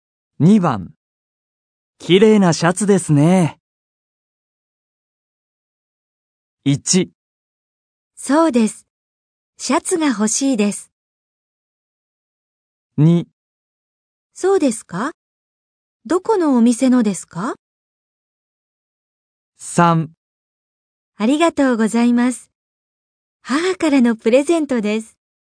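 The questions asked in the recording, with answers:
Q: 綺麗なシャツですね。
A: 3: ありがとうございます。母からのプレゼントです。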